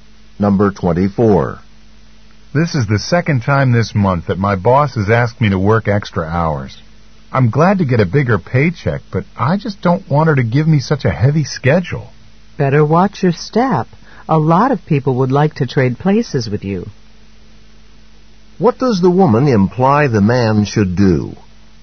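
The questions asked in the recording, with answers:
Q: What does the woman imply the man should do?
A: Be careful not to complain, since many people would like his job.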